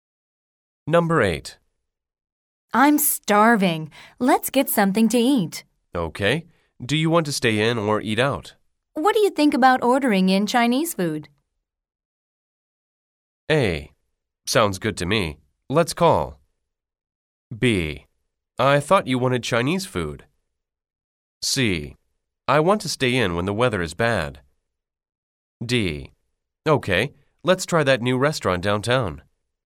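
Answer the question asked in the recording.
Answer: A: Sounds good to me. Let's call.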